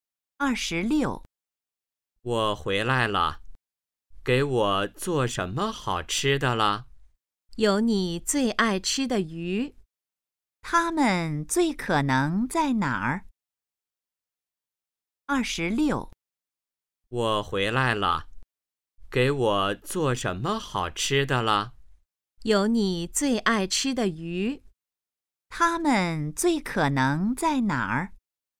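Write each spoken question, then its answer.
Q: 他们最可能在哪儿?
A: 家里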